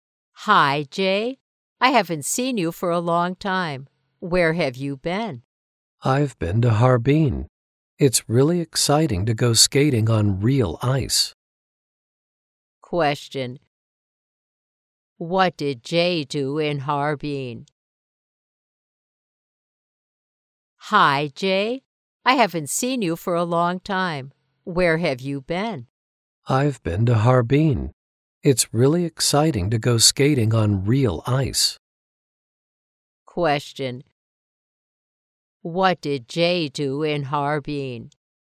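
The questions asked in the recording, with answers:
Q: What did Jay do in Harbin?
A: He went skating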